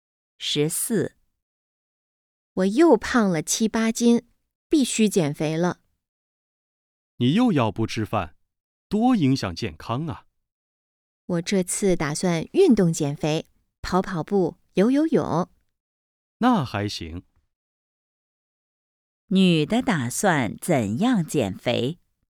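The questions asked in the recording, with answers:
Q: 女的打算怎样减肥?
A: 运动减肥(跑步、游泳)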